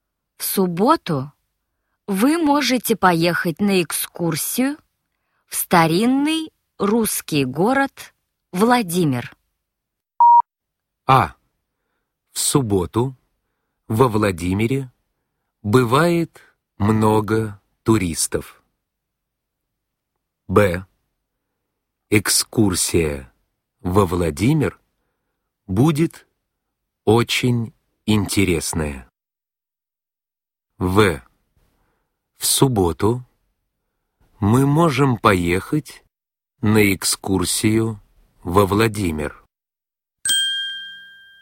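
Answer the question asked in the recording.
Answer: В: В субботу мы можем поехать на экскурсию во Владимир.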